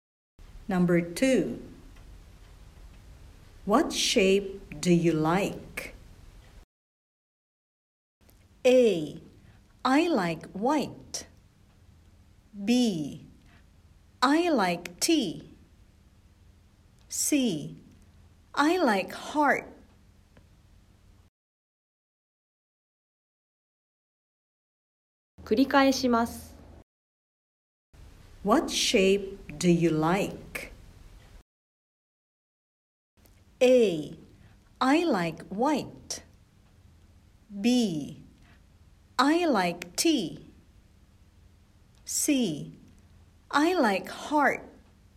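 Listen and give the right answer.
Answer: C: I like heart.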